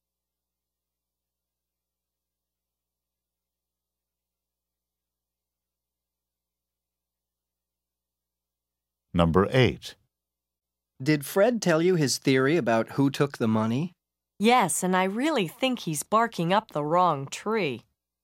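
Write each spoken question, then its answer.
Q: What does the woman mean?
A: Fred's theory is wrong; he suspects the wrong person.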